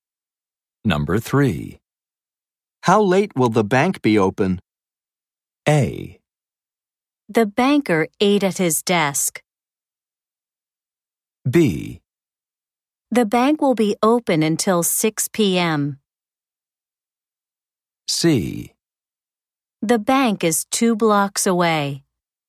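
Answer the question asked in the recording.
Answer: B: The bank will be open until 6 p.m.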